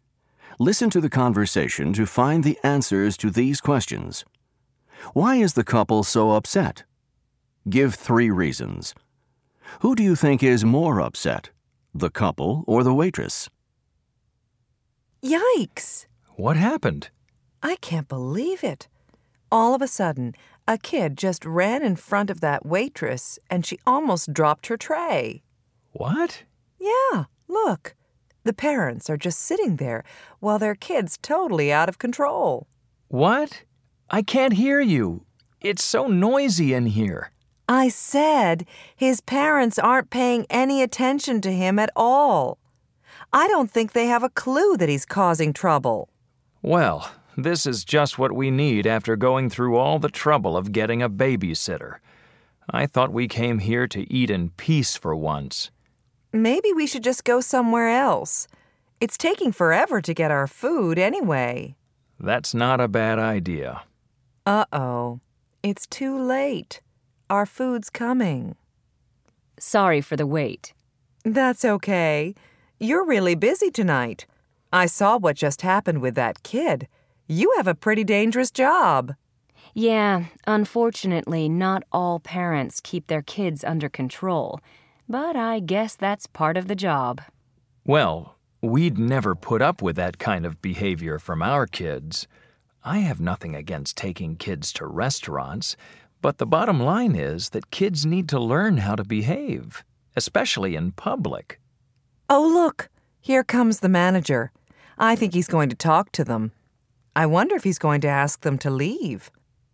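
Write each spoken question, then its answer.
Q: Why is the couple so upset? Give three reasons.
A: A child is running around out of control while his parents ignore him, the restaurant is very noisy, and their food is taking a long time (after they went to the trouble of getting a babysitter).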